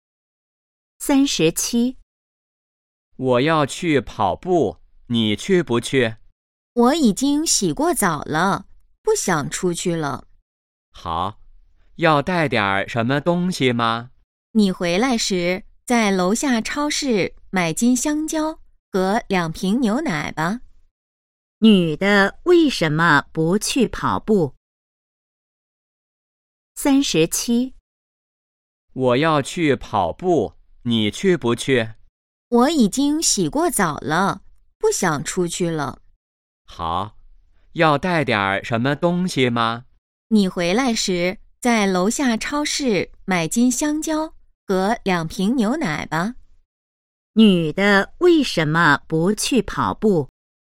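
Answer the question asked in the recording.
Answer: 她已经洗过澡了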